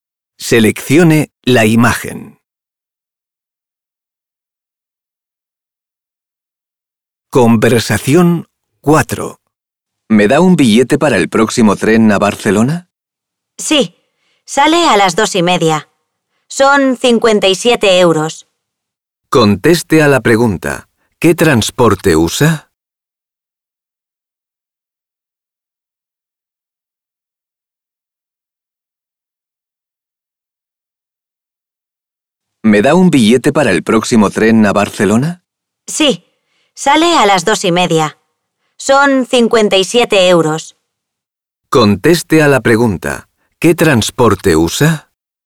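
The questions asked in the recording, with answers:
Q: ¿Qué transporte usa?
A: El tren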